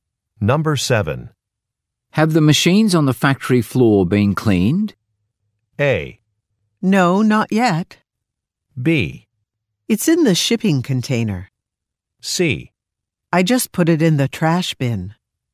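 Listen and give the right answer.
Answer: A: No, not yet.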